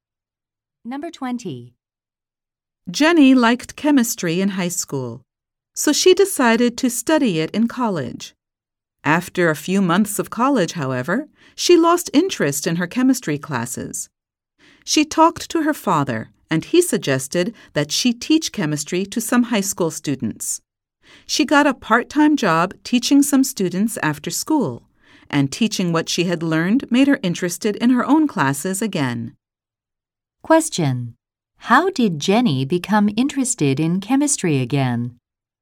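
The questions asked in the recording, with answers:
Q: How did Jenny become interested in chemistry again?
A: By teaching chemistry to high school students.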